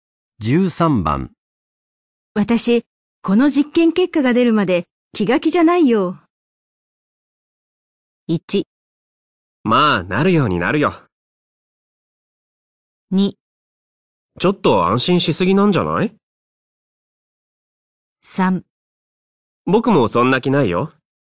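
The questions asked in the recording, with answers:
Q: 私、この実験結果が出るまで気が気じゃないよ。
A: 1: まあ、なるようになるよ。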